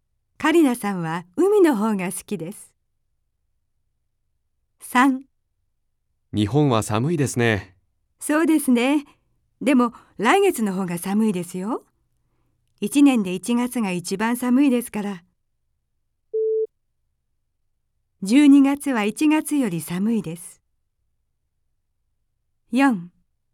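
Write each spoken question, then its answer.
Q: 12月は1月より寒いです。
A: × (1月が一番寒い)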